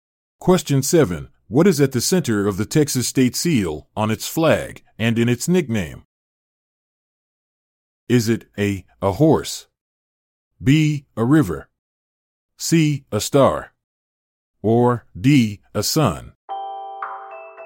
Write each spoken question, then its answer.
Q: What is at the center of the Texas state seal, on its flag, and in its nickname?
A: The answer is C. A star.